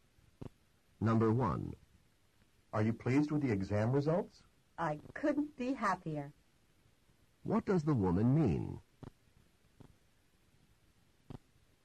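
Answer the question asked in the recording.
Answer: She is extremely happy with the results.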